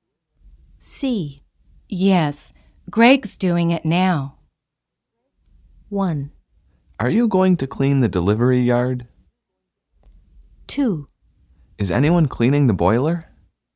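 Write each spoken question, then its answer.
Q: Yes, Greg's doing it now.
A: 2: Is anyone cleaning the boiler?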